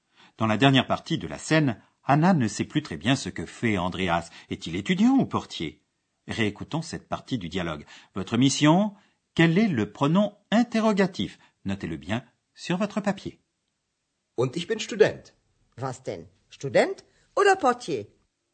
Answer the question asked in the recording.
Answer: Troisième mot cherché, le pronom interrogatif was.